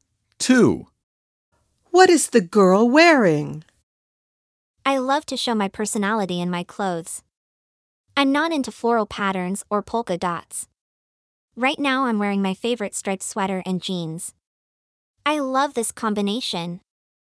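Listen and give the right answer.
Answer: a striped sweater and jeans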